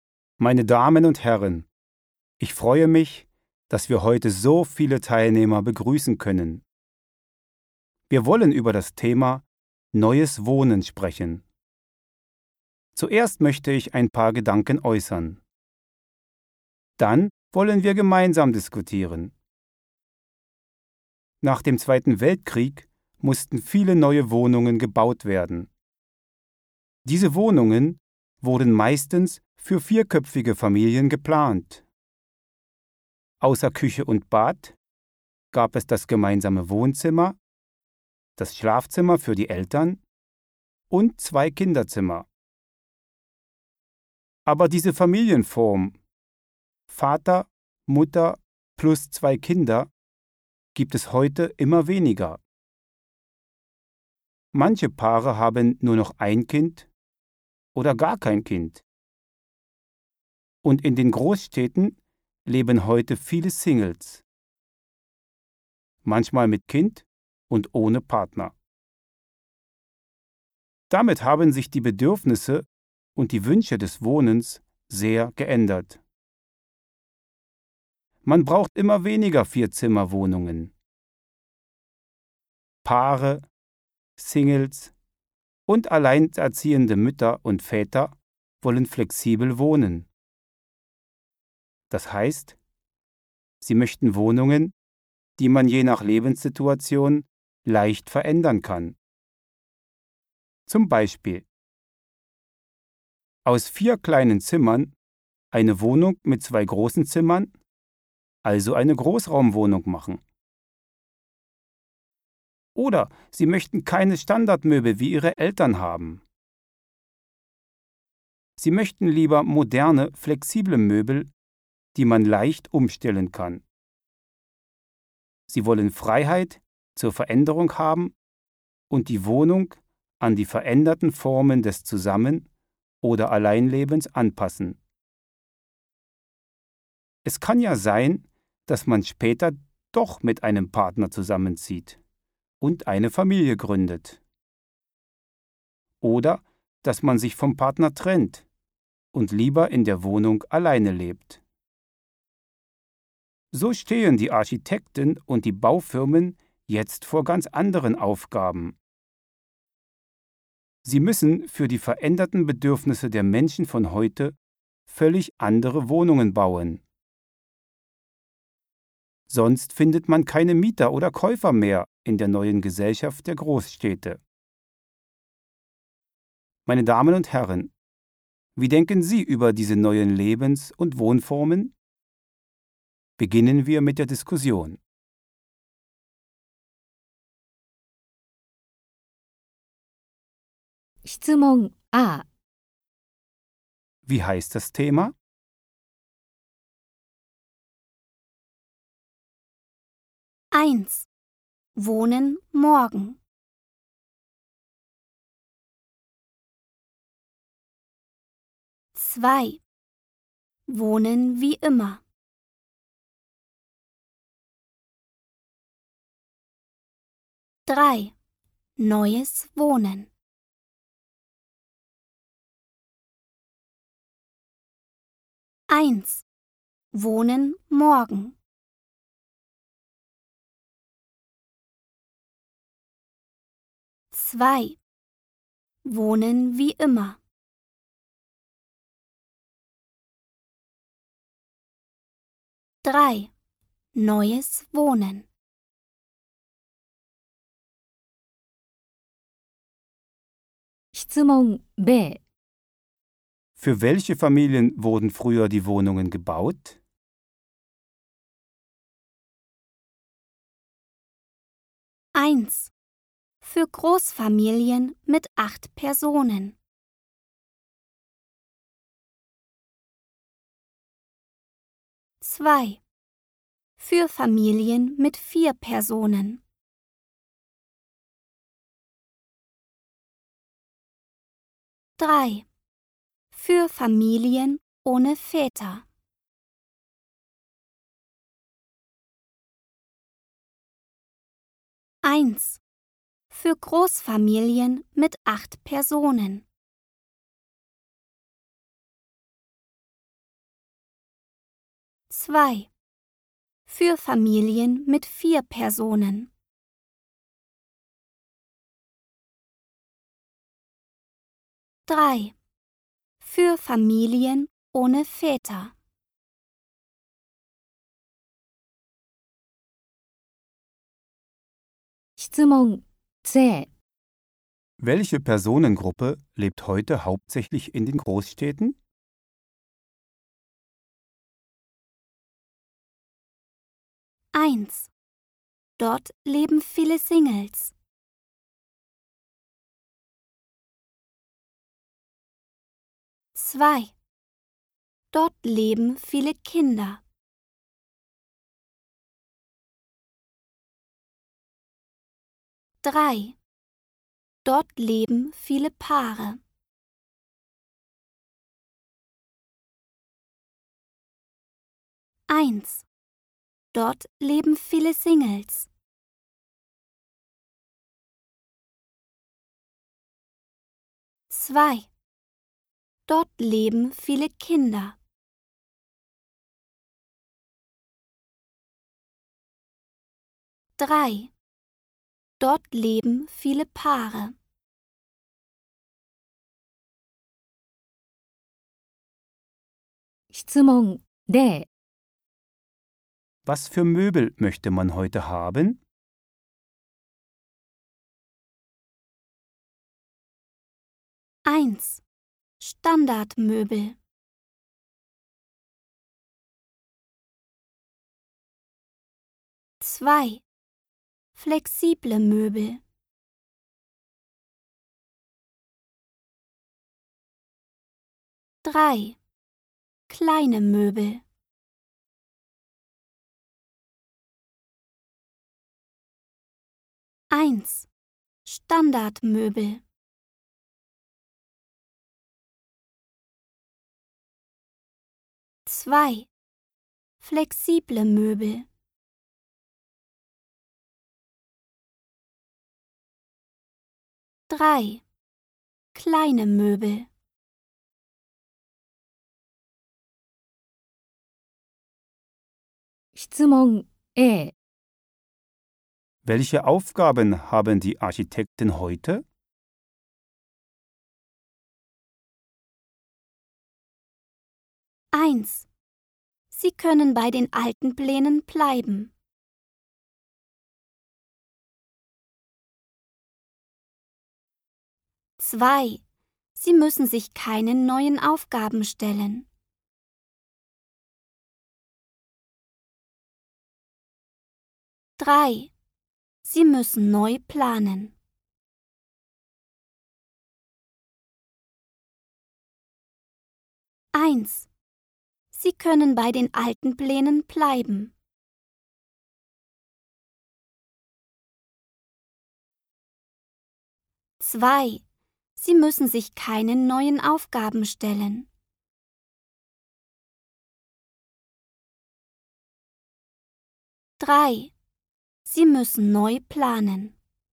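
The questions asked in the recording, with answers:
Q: Wie heißt das Thema?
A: 3: Neues Wohnen

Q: Für welche Familien wurden früher die Wohnungen gebaut?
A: 2: Für Familien mit 4 Personen.

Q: Welche Personengruppe lebt heute hauptsächlich in den Großstädten?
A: 1: Dort leben viele Singles.

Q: Was für Möbel möchte man heute haben?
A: 2: Flexible Möbel.

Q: Welche Aufgaben haben die Architekten heute?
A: 3: Sie müssen neu planen.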